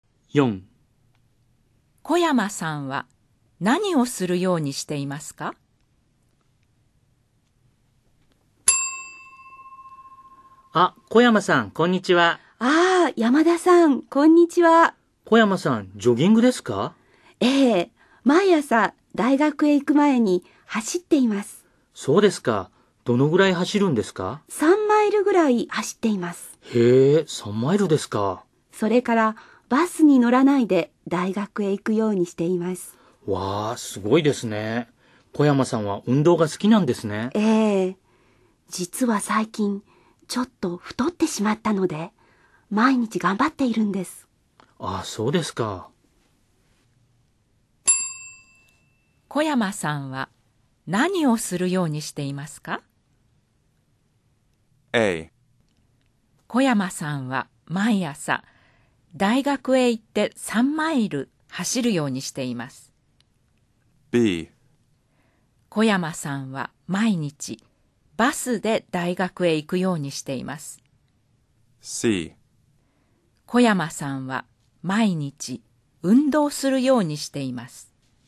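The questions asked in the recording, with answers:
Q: 小山さんは何をするようにしていますか?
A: C: 小山さんは毎日運動するようにしています。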